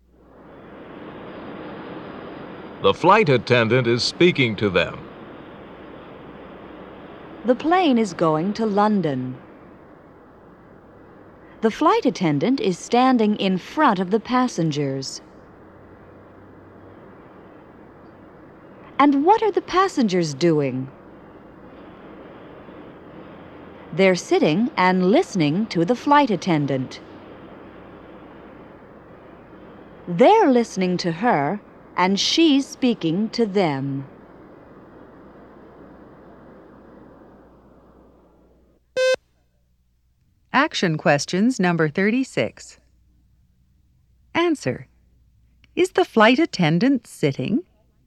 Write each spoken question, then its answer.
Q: Is the flight attendant sitting?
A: No, she's not.